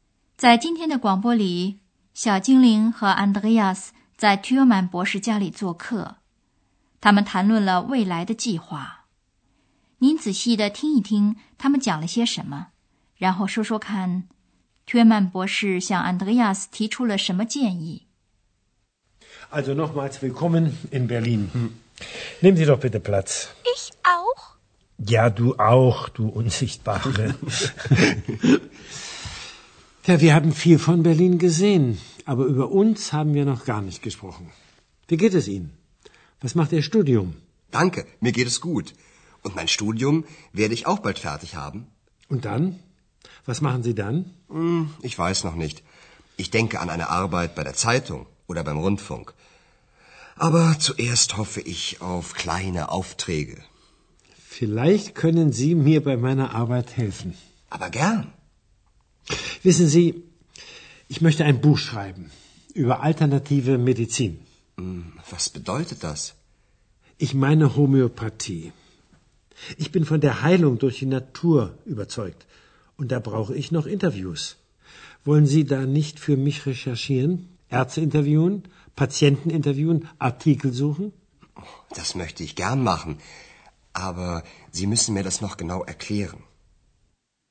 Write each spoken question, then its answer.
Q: 您仔细地听一听他们讲了些什么,然后说说看 Thürmann 博士向 Andreas 提出了什么建议。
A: 薛曼博士问安德烈亚斯能不能帮他对自然疗法的医学进行一些调查研究。